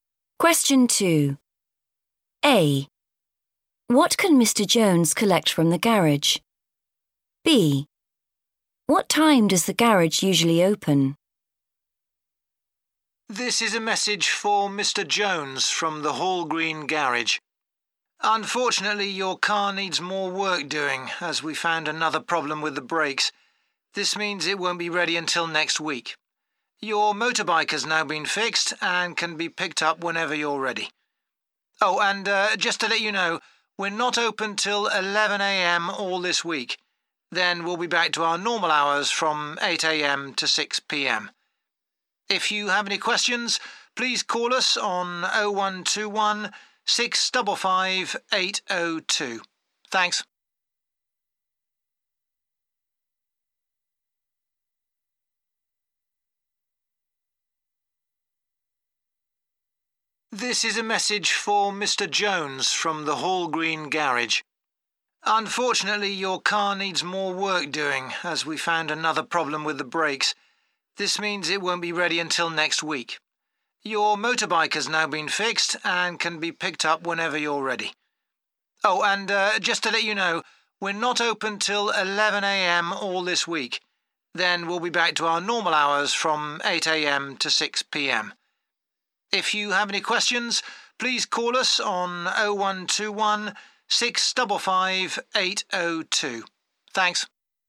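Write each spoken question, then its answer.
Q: What can Mr. Jones collect from the garage?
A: his motorbike

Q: What time does the garage usually open?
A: 8 a.m.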